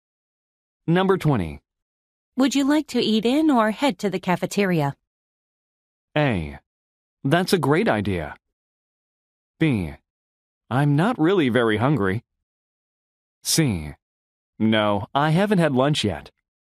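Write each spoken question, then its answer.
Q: Would you like to eat in or head to the cafeteria?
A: B: I'm not really very hungry.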